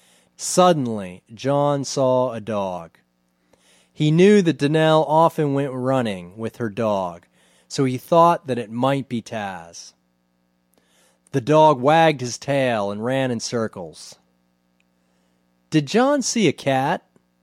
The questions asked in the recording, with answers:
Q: Did John see a cat?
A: No, John didn't see a cat.